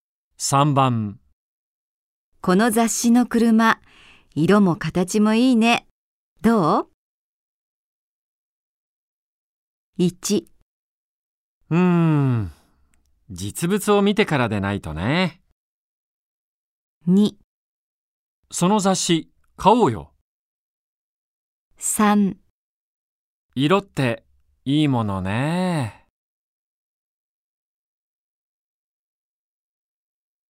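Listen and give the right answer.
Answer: 1: 実物を見てからでないとね。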